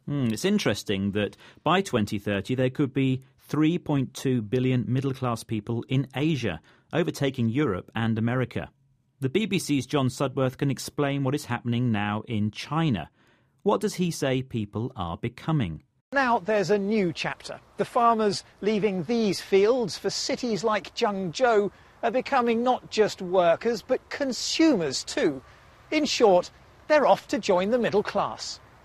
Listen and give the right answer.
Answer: They are becoming consumers because their income, the money they earn, has gone up.